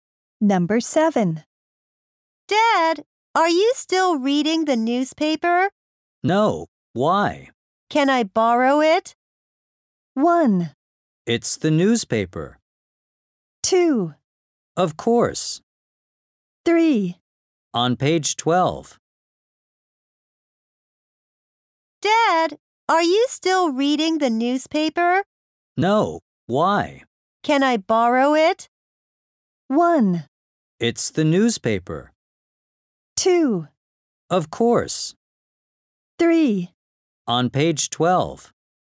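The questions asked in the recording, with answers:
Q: Can I borrow it?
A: 2: Of course.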